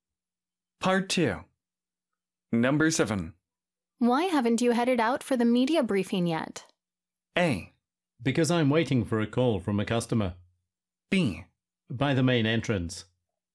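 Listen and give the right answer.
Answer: A: Because I'm waiting for a call from a customer.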